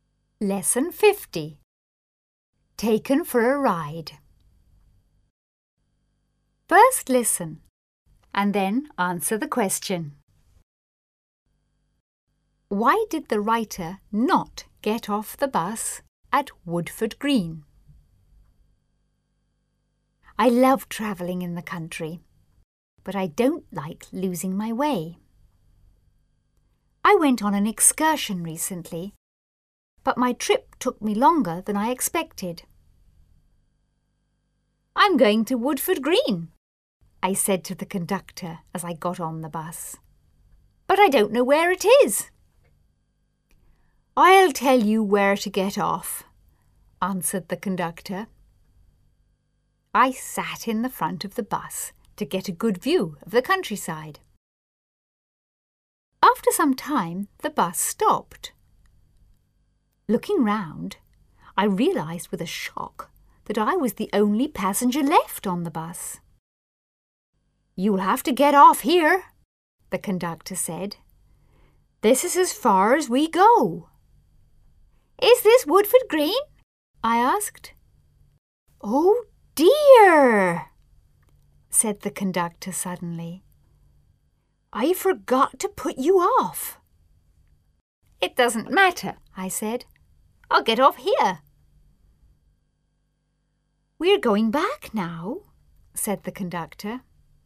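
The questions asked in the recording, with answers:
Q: Why did the writer not get off the bus at Woodford Green?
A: The conductor forgot to tell him where to get off.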